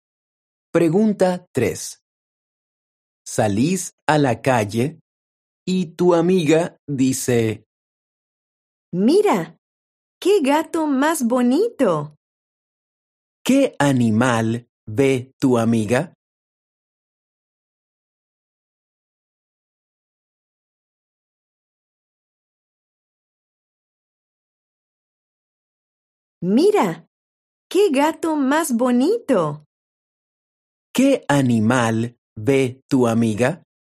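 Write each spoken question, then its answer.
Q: ¿Qué animal ve tu amiga?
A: un gato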